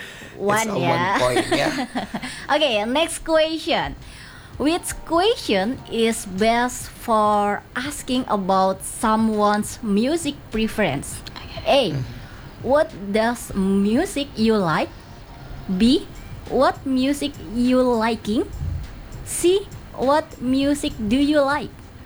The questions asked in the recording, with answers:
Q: Which question is best for asking about someone's music preference?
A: It's C. What music do you like?